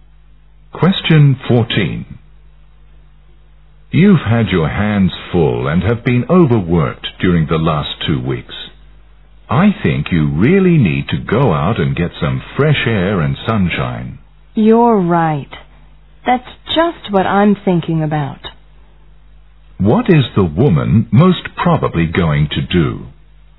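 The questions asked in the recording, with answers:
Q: What is the woman most probably going to do?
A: Go out and get some fresh air and sunshine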